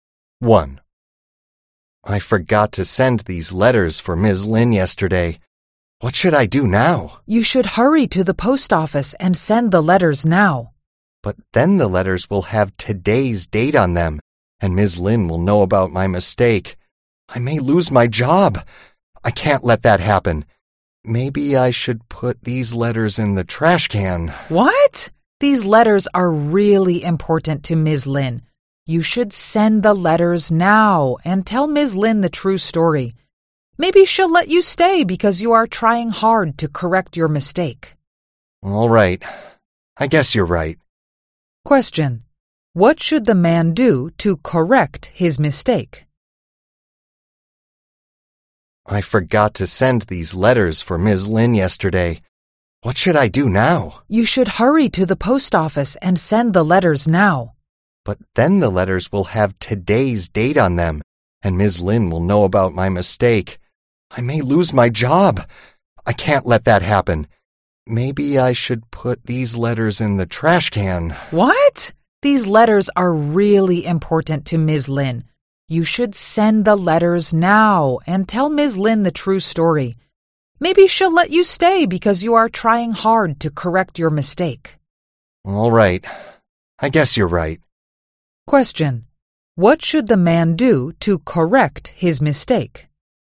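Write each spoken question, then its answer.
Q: What should the man do to correct his mistake?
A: Send the letters now and tell Ms. Lin the true story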